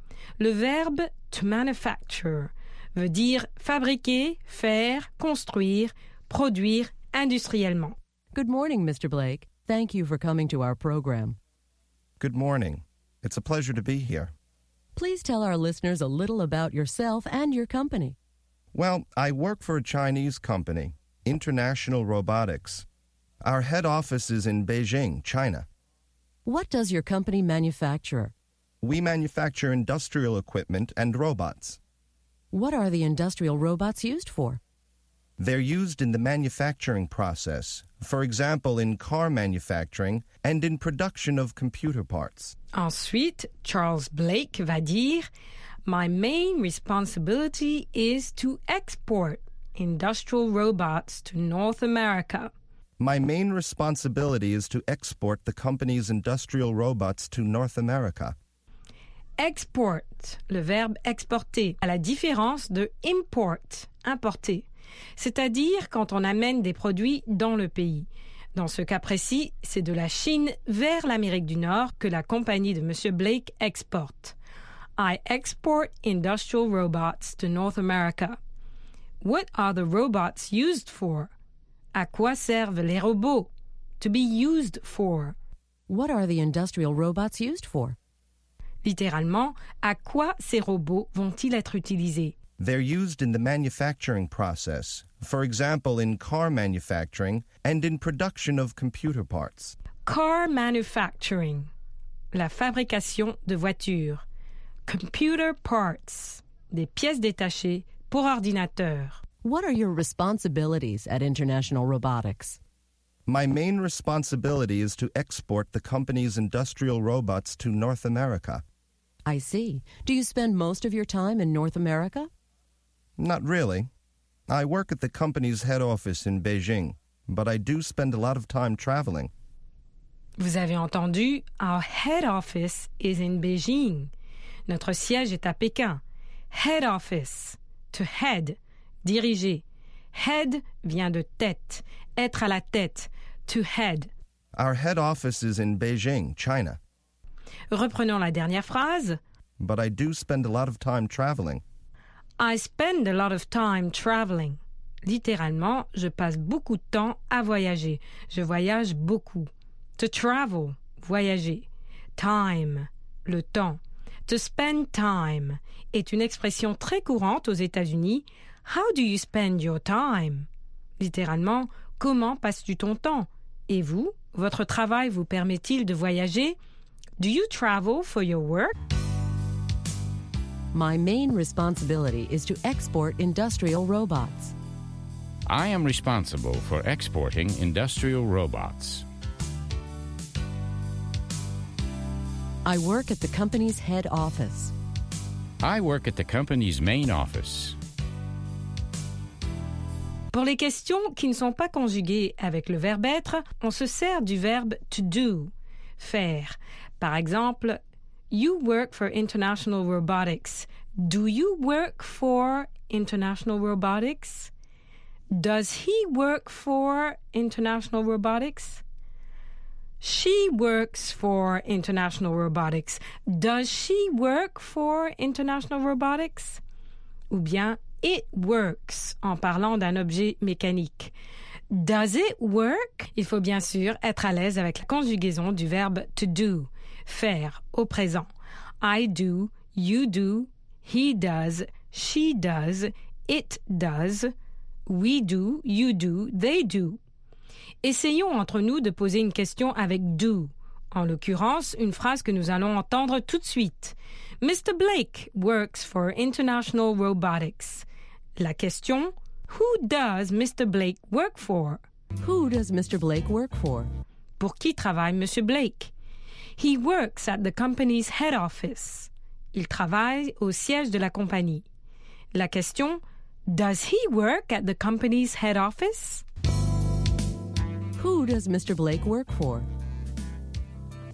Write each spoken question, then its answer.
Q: Who does Mr. Blake work for?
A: He works for International Robotics, a Chinese company.